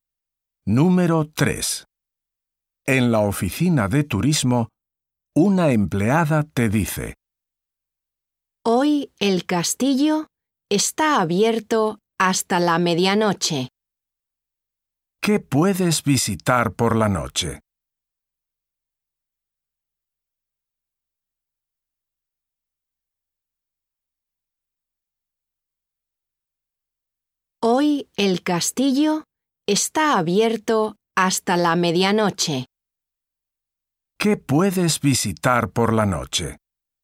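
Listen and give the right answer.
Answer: El castillo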